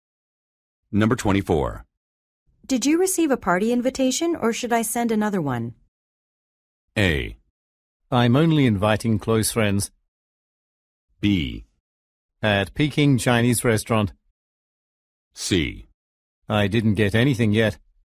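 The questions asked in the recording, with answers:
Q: Did you receive a party invitation or should I send another one?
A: C: I didn't get anything yet.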